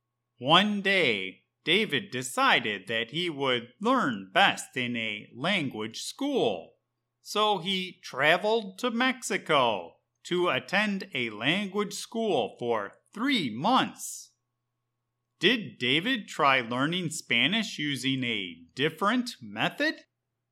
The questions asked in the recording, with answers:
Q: Did David try learning Spanish using a different method?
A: Yes. David tried to learn Spanish by attending a language school in Mexico for three months.